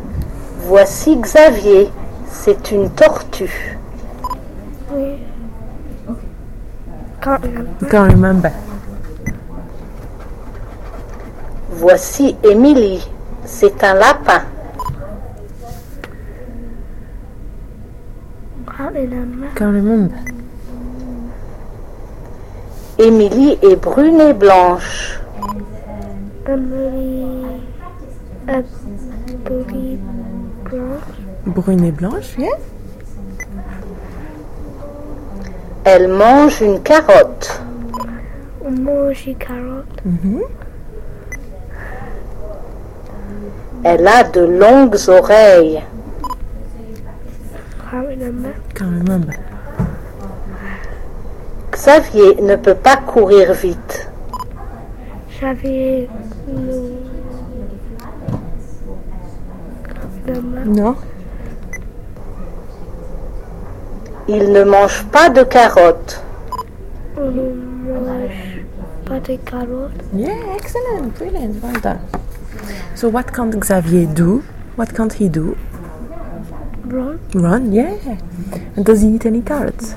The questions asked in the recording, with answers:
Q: So what can't Xavier do? What can't he do?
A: Run, yeah.

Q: And does he eat any carrots?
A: No.